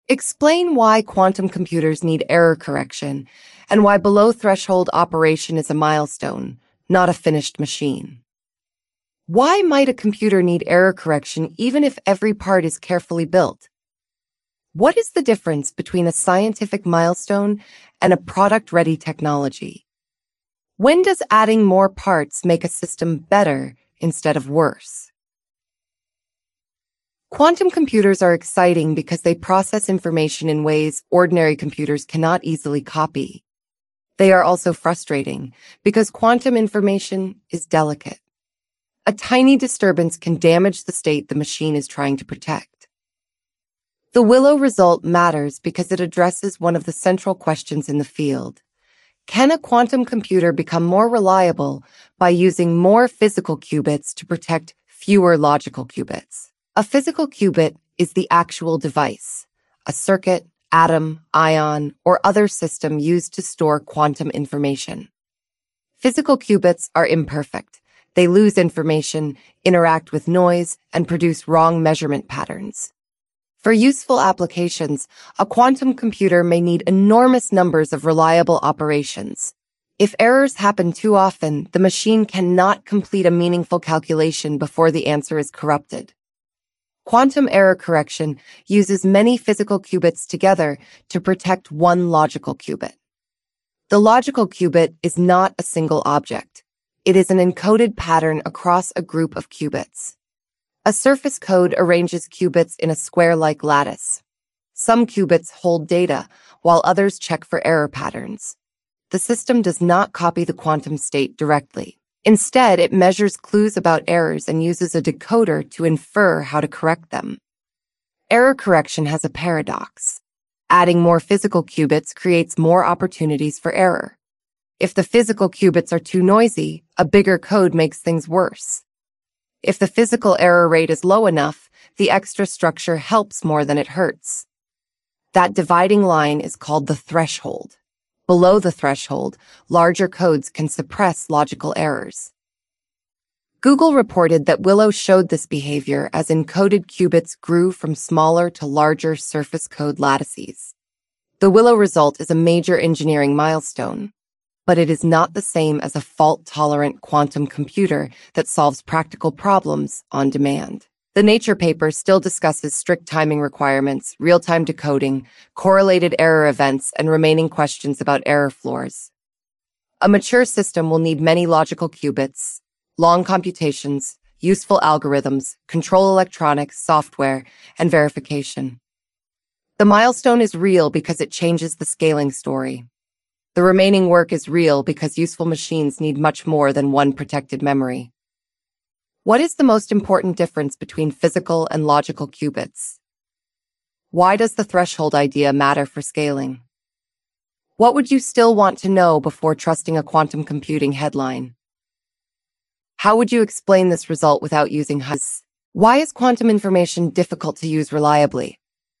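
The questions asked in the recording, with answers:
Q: What is the most important difference between physical and logical qubits?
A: A physical qubit is the actual device storing quantum information; a logical qubit is an encoded pattern spread across many physical qubits to protect it

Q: Why does the threshold idea matter for scaling?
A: Below the threshold, larger codes suppress logical errors, so adding qubits helps instead of hurting

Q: Why is quantum information difficult to use reliably?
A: It is delicate and can be damaged by errors from the physical device and environment.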